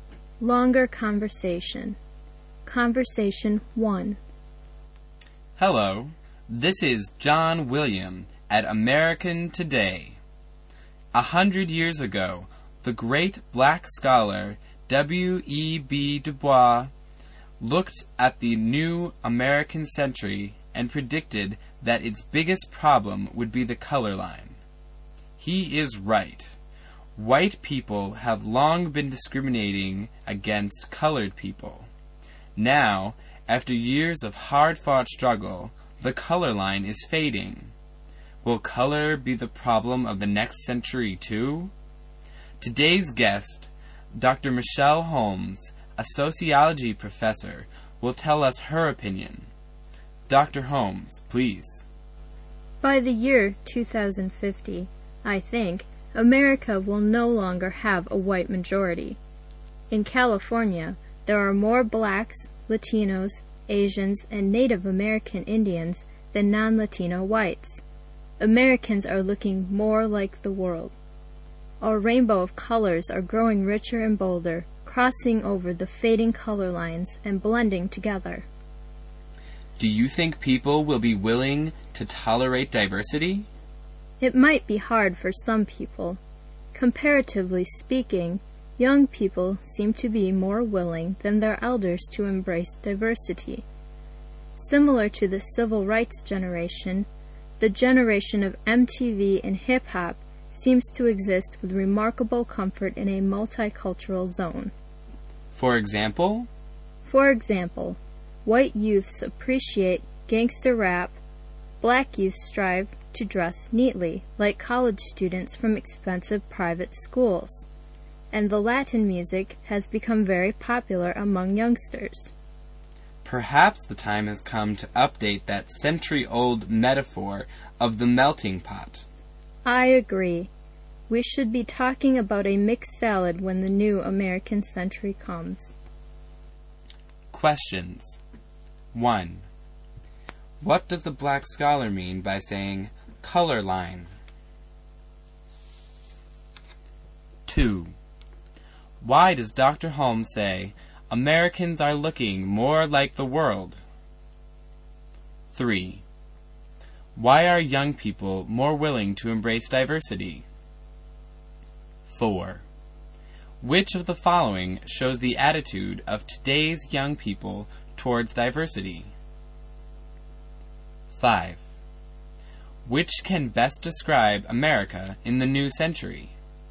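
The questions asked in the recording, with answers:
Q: What does the black scholar mean by saying color line?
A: Racial division: discrimination by white people against people of color

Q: Why does Dr. Holmes say Americans are looking more like the world?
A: Because the population is becoming more racially diverse, and whites will no longer be the majority

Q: Which can best describe America in the new century?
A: A mixed salad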